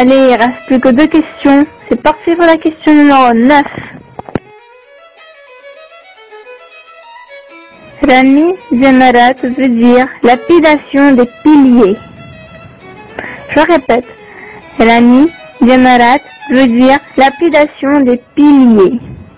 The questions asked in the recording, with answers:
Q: Rami Zemarat veut dire lapidation des piliers.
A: C'est vrai.